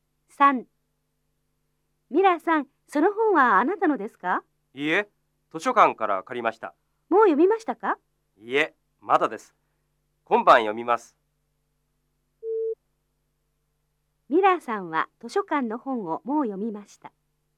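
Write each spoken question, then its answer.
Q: ミラーさんは図書館の本をもう読みました。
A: ×(まだ読んでいません)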